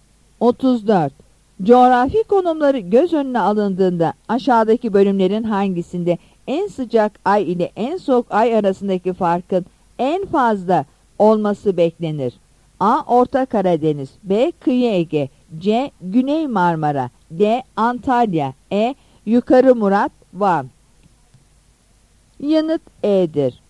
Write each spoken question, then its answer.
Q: Coğrafi konumları göz önüne alındığında aşağıdaki bölümlerin hangisinde en sıcak ay ile en soğuk ay arasındaki farkın en fazla olması beklenir?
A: Yanıt E'dir.